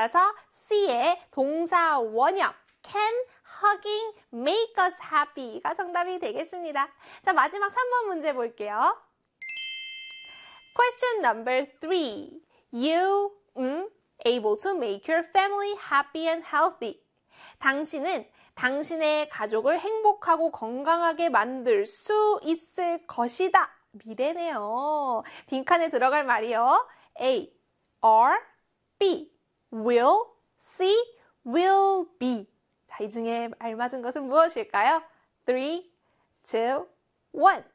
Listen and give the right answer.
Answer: C의 will be였습니다.